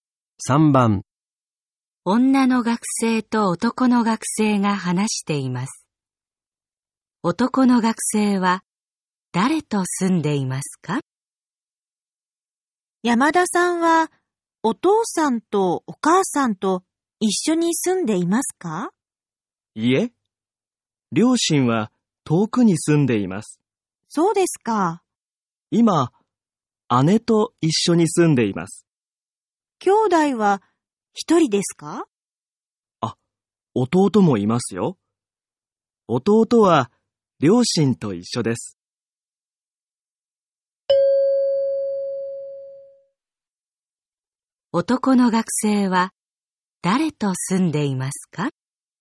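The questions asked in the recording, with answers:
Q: 男の学生は誰と住んでいますか?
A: お姉さん(姉)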